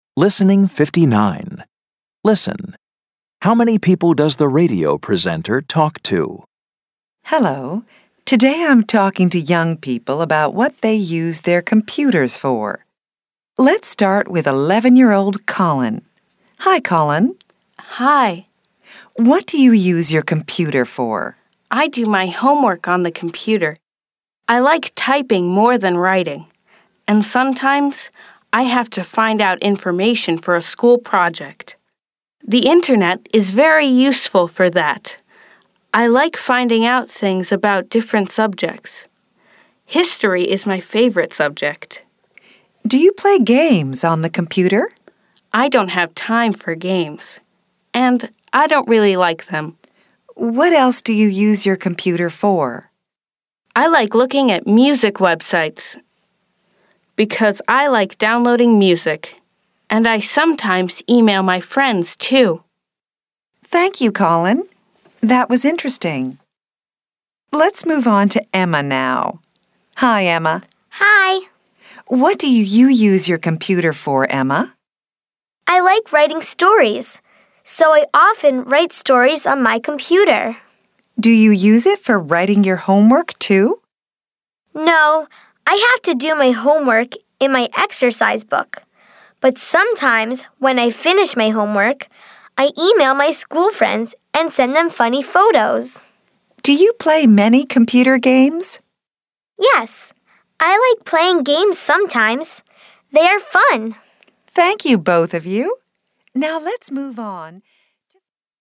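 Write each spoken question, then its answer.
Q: How many people does the radio presenter talk to?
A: Two (Colin and Emma)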